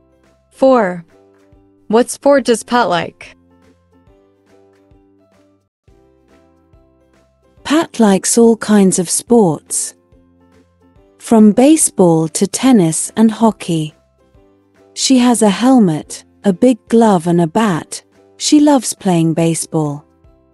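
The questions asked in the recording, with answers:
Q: What sport does Pat like?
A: baseball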